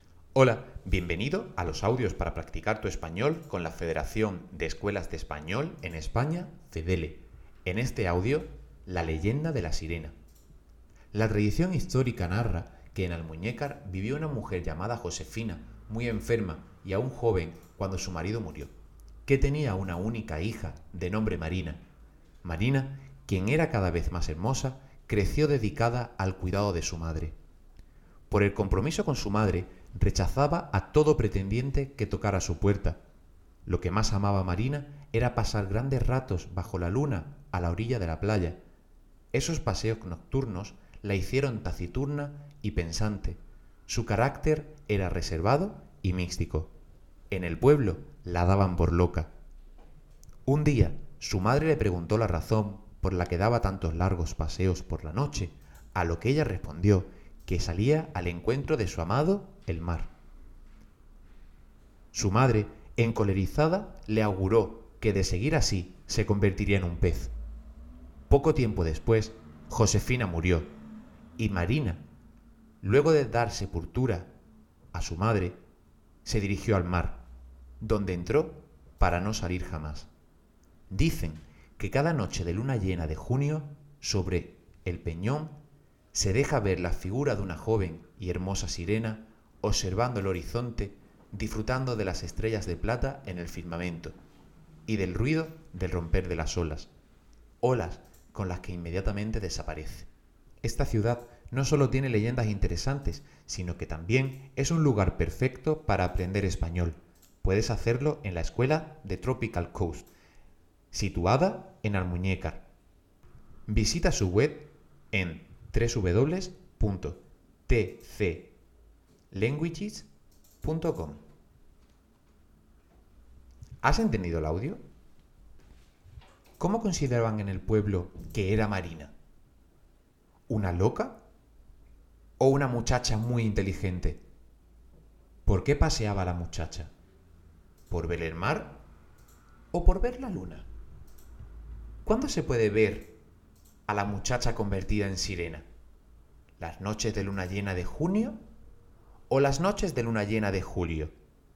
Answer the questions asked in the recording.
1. Correcto, en el pueblo la trataban de loca.
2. Iba al mar, porque era lo que deseaba ver.
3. Se puede ver a la muchacha las noches de luna llena de junio.